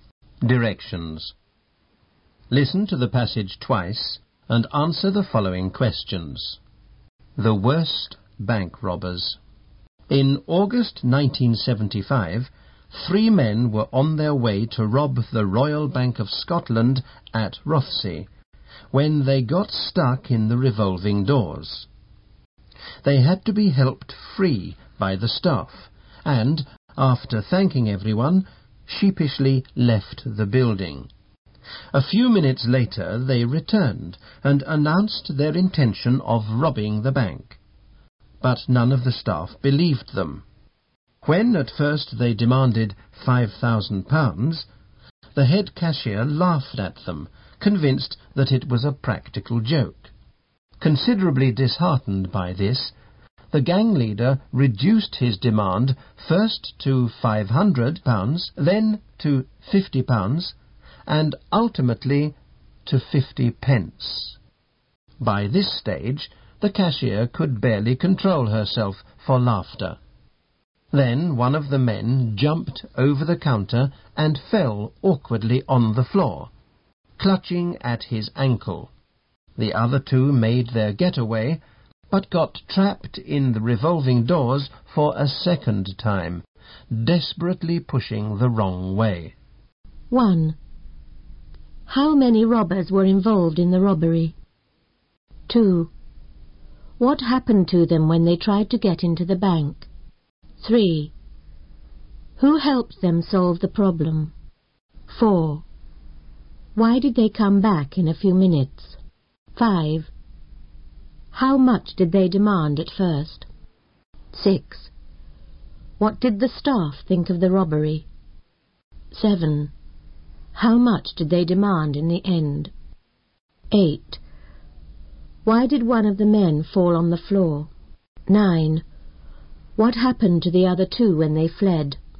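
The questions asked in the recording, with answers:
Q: How many robbers were involved in the robbery?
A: Three.

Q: What happened to them when they tried to get into the bank?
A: They got stuck in the revolving doors.

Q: Who helped them solve the problem?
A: The bank staff.

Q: Why did they come back in a few minutes?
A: To rob the bank.

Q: How much did they demand at first?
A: £5,000.

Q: What did the staff think of the robbery?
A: They thought it was a practical joke.

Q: How much did they demand in the end?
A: 50 pence.

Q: Why did one of the men fall on the floor?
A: He jumped over the counter and landed awkwardly.

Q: What happened to the other two when they fled?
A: They got trapped in the revolving doors again, pushing the wrong way.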